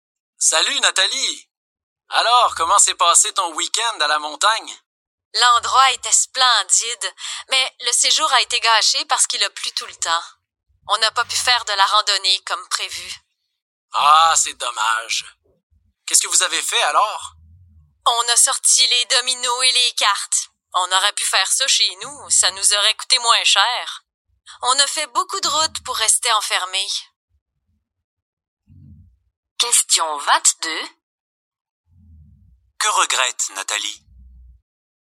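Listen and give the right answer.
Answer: D'avoir dépensé et fait beaucoup de route pour rester enfermée à cause de la pluie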